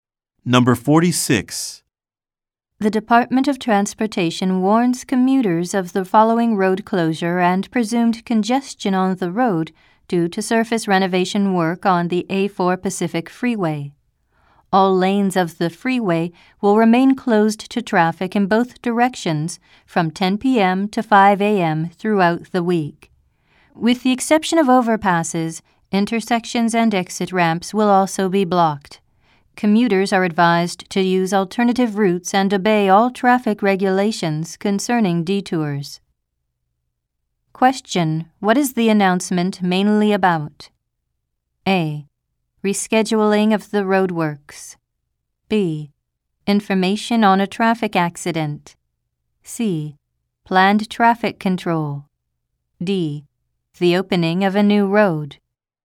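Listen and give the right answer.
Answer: C: Planned traffic control.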